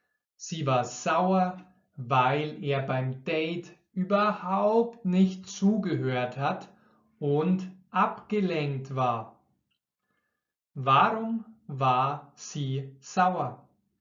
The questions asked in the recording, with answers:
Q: war sie sauer?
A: Weil er beim Date überhaupt nicht zugehört hat und abgelenkt war.